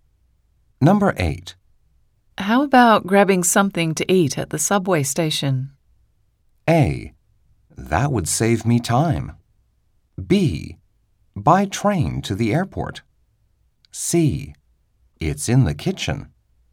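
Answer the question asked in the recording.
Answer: A: That would save me time.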